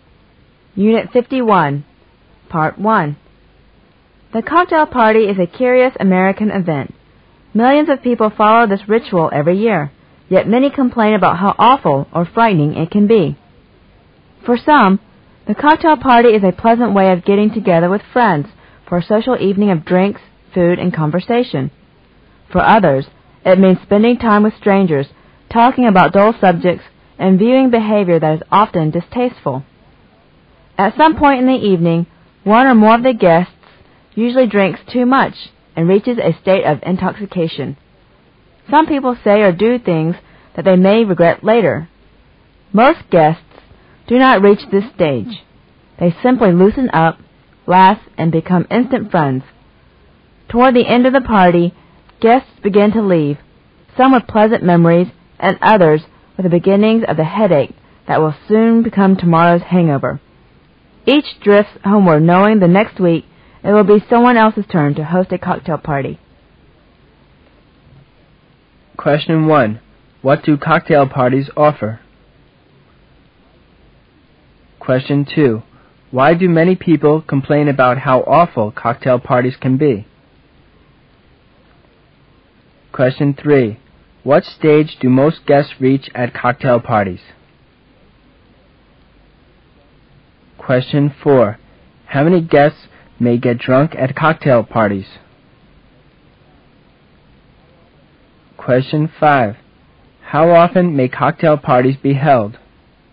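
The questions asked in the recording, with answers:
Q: What do cocktail parties offer?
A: Drinks, food and conversation

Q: Why do many people complain about how awful cocktail parties can be?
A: Strangers, dull subjects and distasteful behavior

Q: What stage do most guests reach at cocktail parties?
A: They loosen up, laugh and become instant friends

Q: How many guests may get drunk at cocktail parties?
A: One or more

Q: How often may cocktail parties be held?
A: Every week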